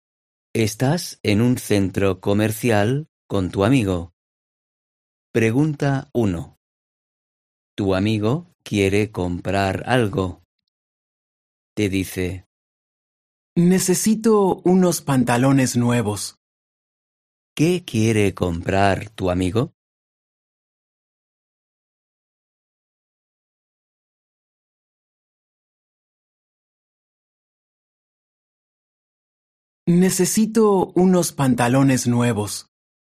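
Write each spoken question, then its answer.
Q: ¿Qué quiere comprar tu amigo?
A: unos pantalones nuevos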